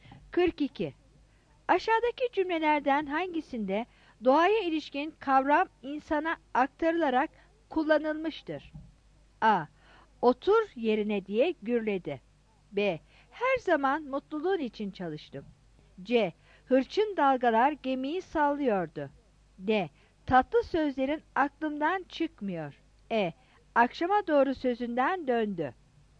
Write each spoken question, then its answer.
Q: Aşağıdaki cümlelerden hangisinde doğaya ilişkin kavram insana aktarılarak kullanılmıştır?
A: 43 A